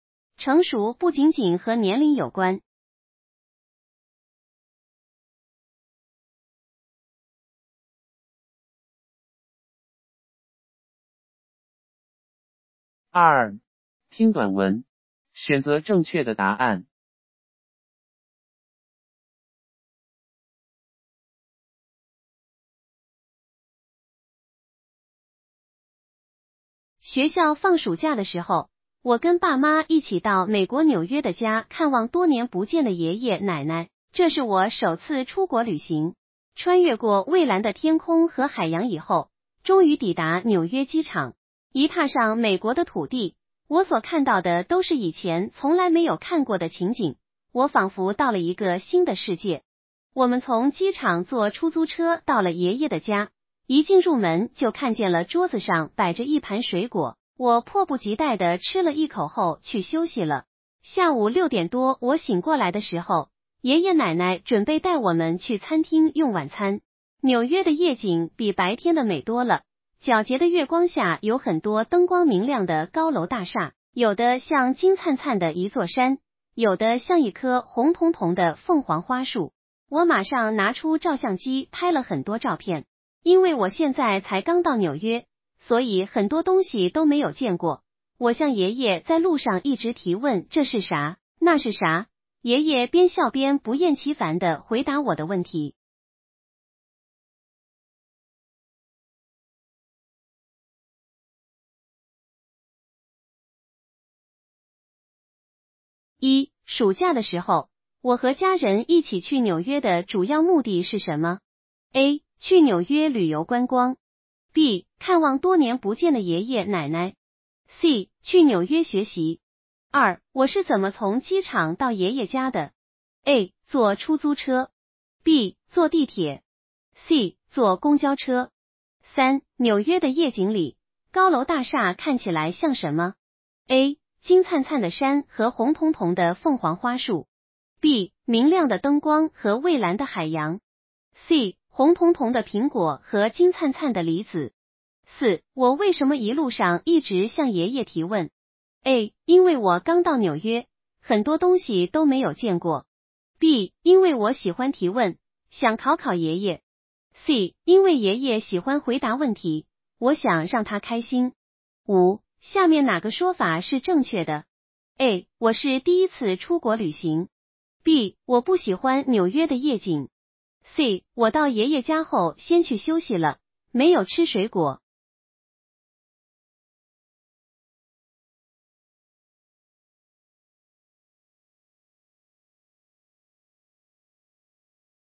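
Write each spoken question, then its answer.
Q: 暑假的时候,我和家人一起去纽约的主要目的是什么?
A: B: 看望多年不见的爷爷奶奶。

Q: 我是怎么从机场到爷爷家的?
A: A: 坐出租车。

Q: 纽约的夜景里,高楼大厦看起来像什么?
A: A: 金灿灿的山和红彤彤的凤凰花树。

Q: 我为什么一路上一直向爷爷提问?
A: A: 因为我刚到纽约,很多东西都没有见过。

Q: 下面哪个说法是正确的?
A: A: 我是第一次出国旅行。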